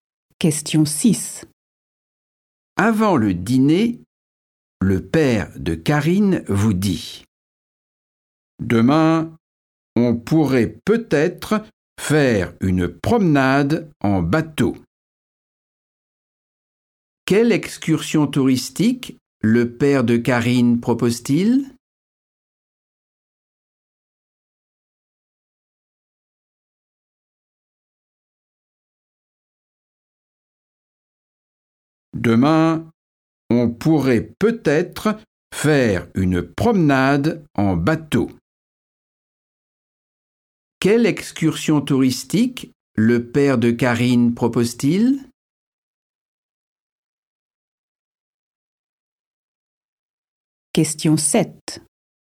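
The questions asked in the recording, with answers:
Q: Quelle excursion touristique le père de Karine propose-t-il ?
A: une promenade en bateau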